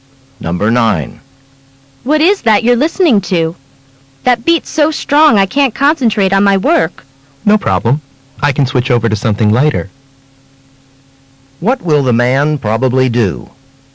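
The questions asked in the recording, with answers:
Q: What will the man probably do?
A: Switch to lighter music.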